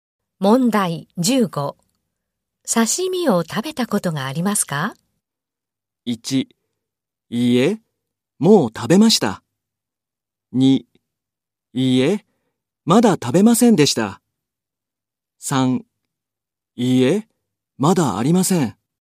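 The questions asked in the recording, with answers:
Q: 刺身を食べたことがありますか?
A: 2: いいえ、まだありません。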